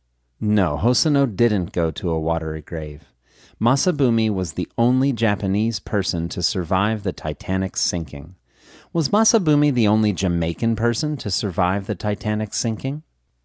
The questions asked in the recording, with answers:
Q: Was Masabumi the only Jamaican person to survive the Titanic sinking?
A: No, Masabumi wasn't the only Jamaican person to survive the Titanic sinking.